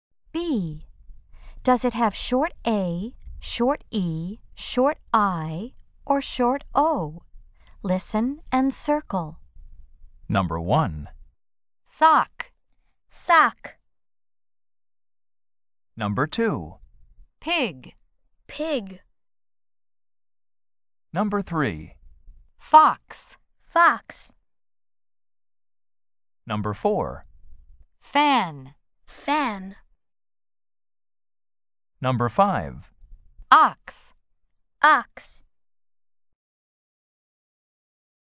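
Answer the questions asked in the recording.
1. short O (sock)
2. short I (pig)
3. short O (fox)
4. short A (fan)
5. short O (ox)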